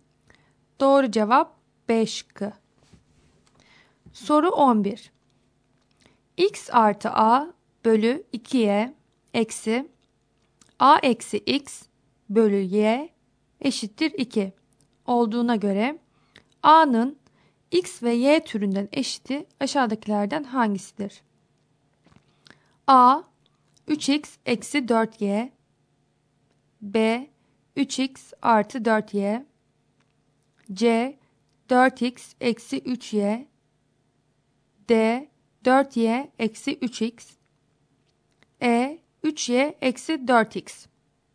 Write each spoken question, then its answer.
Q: X artı A bölü 2Y eksi A eksi X bölü Y eşittir 2 olduğuna göre A'nın X ve Y türünden eşiti aşağıdakilerden hangisidir?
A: Doğru cevap A şıkkı.